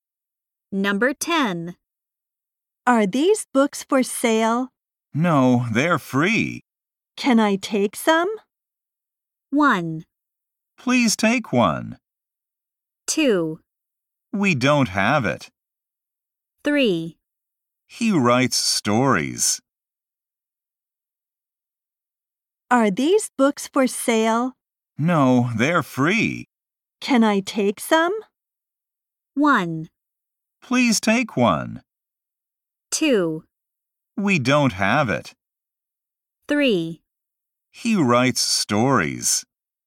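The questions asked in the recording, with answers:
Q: Can I take some?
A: 1: Please take one.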